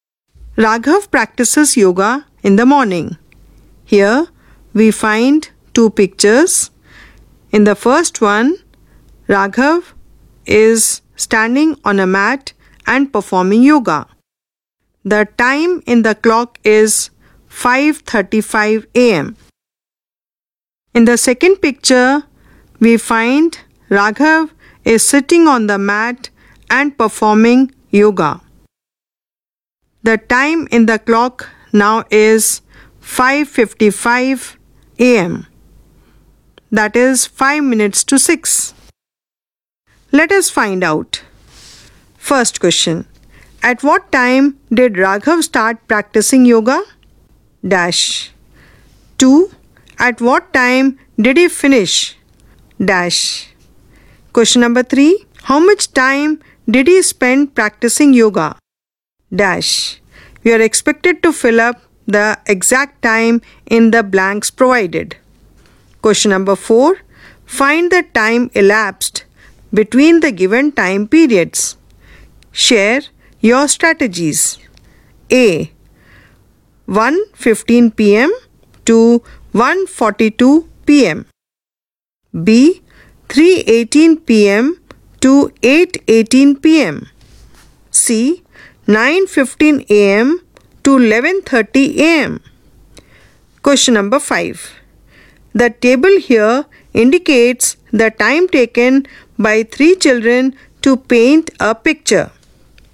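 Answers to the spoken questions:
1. 5:35 a.m.
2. 5:55 a.m.
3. 20 minutes
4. 27 minutes
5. 5 hours
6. 2 hours 15 minutes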